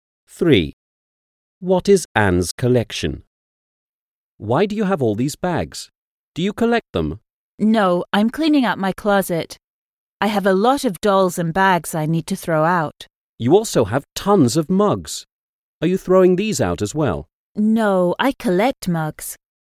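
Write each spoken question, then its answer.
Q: What is Anne's collection?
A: Mugs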